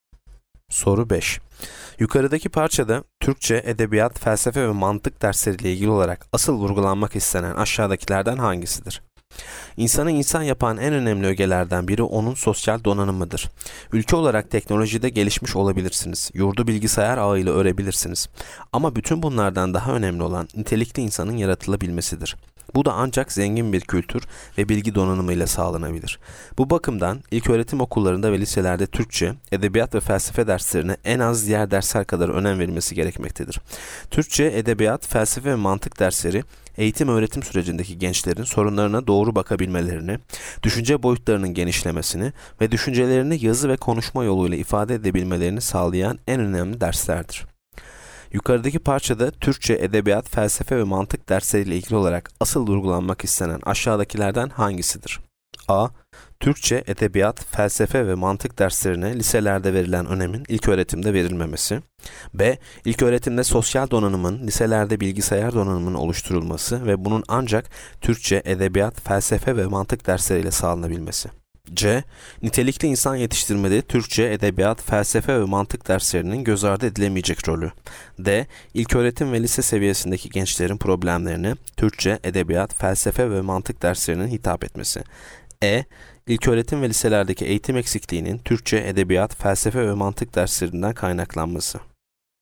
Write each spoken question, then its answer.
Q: Yukarıdaki parçada Türkçe, edebiyat, felsefe ve mantık dersleriyle ilgili olarak asıl vurgulanmak istenen aşağıdakilerden hangisidir?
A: Yanıt C. Nitelikli insan yetiştirmede Türkçe, edebiyat, felsefe ve mantık derslerinin göz ardı edilemeyecek rolü.